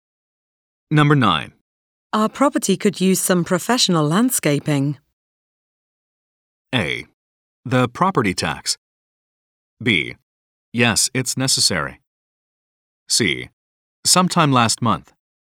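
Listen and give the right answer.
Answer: B: Yes, it's necessary.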